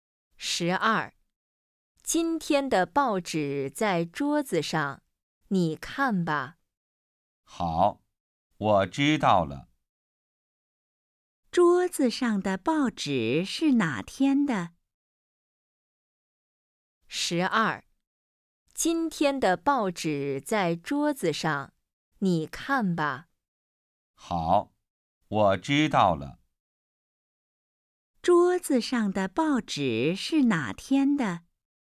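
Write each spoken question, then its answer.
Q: 桌子上的报纸是哪天的?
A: 今天的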